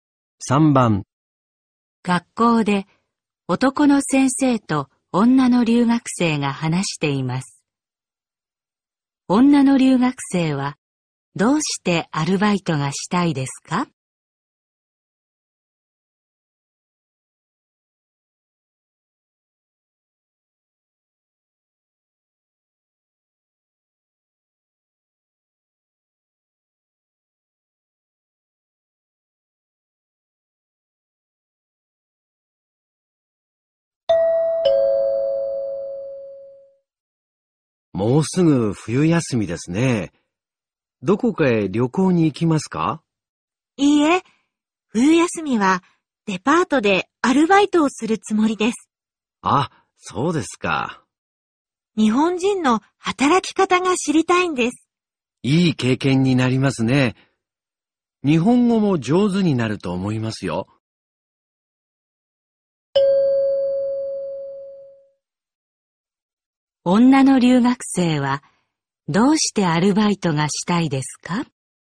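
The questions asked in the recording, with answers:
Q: 女の留学生はどうしてアルバイトがしたいですか?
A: 日本人の働き方が知りたいから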